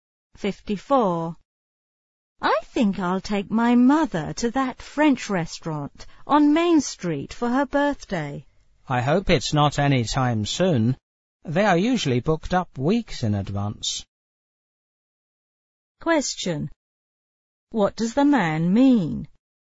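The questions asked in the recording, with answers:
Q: What does the man mean?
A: She should book the restaurant well in advance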